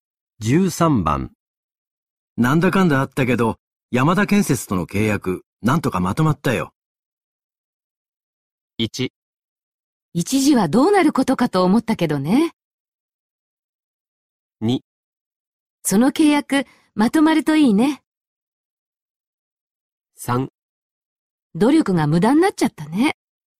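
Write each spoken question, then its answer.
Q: なんだかんだあったけど、山田建設との契約、なんとかまとまったよ。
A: 1: 一時はどうなることかと思ったけどね。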